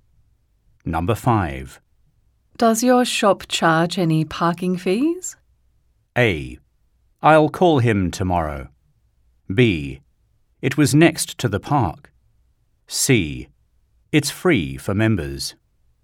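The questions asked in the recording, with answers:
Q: Does your shop charge any parking fees?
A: C: It's free for members.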